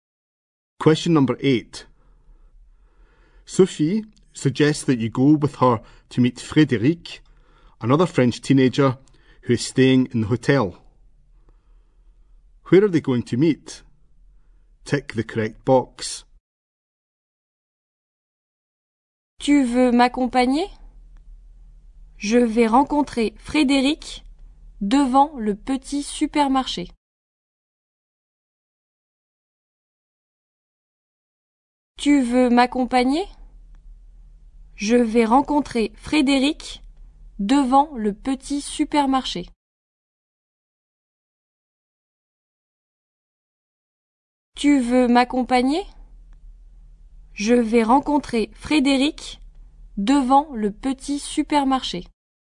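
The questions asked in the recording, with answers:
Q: Where are they going to meet?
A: In front of the little supermarket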